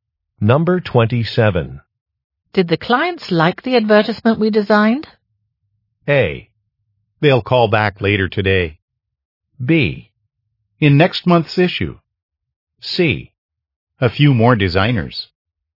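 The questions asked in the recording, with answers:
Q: Did the clients like the advertisement we designed?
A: A: They'll call back later today.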